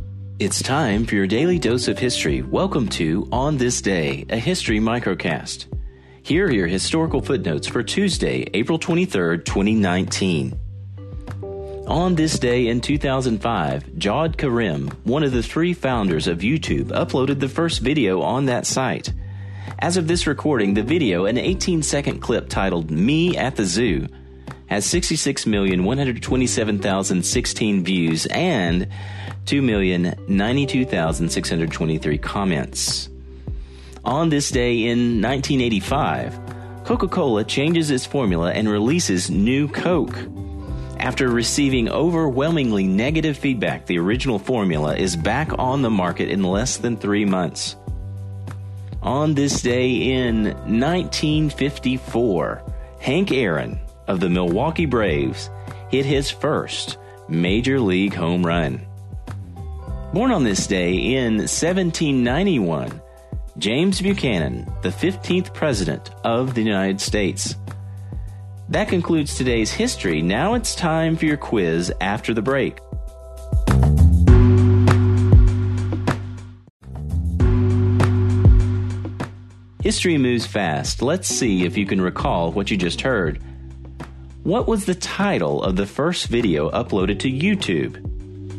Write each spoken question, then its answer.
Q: What was the title of the first video uploaded to YouTube?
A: Me at the Zoo.